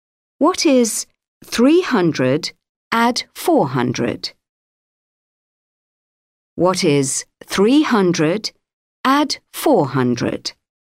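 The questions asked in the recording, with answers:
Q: What is 300 add 400?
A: 700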